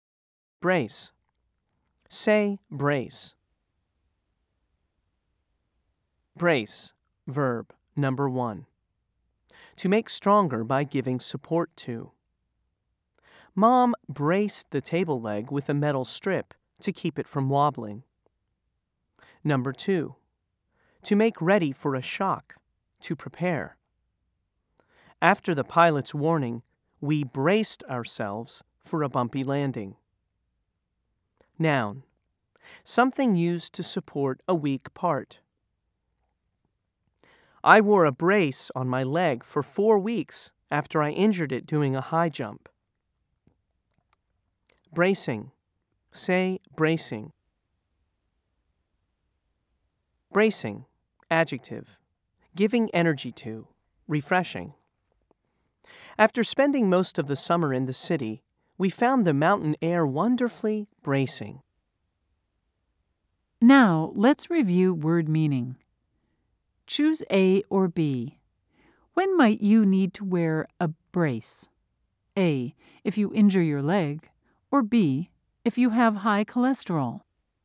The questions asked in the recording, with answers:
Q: Choose A or B. When might you need to wear a brace?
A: If you said A, you're right.